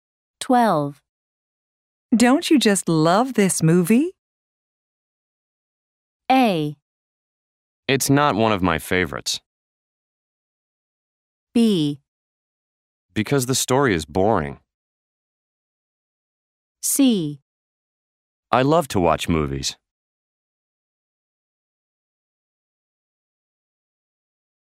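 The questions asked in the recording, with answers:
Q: Don't you just love this movie?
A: A: It's not one of my favorites.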